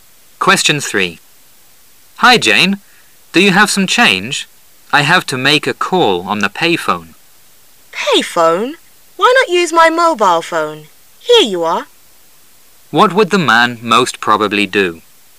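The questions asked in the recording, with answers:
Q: What would the man most probably do?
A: Use Jane's mobile phone to make the call

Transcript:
[解析] M: Hi, Jane, do you have some change? I have to make a call on the pay phone. Why not use my mobile phone? Here you are. Q: What would the man most probably do?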